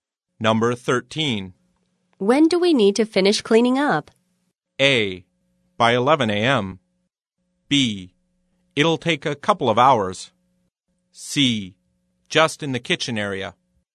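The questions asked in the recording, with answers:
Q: When do we need to finish cleaning up?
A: A: By 11 a.m.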